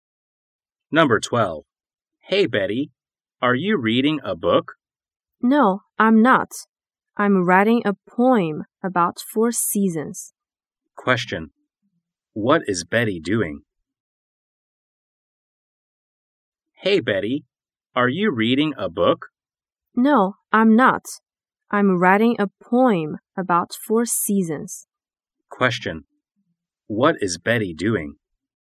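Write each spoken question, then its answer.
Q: What is Betty doing?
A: Writing a poem about four seasons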